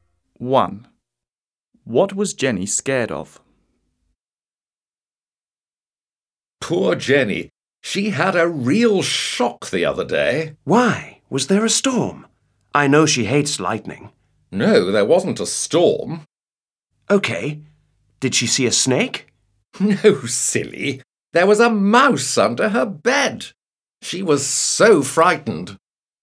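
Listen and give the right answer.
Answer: a mouse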